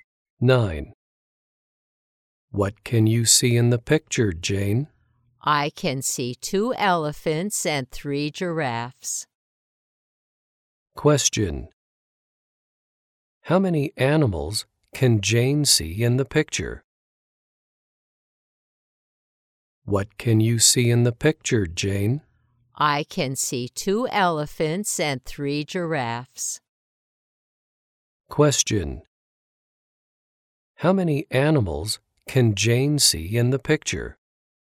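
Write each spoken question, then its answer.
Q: How many animals can Jane see in the picture?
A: Five.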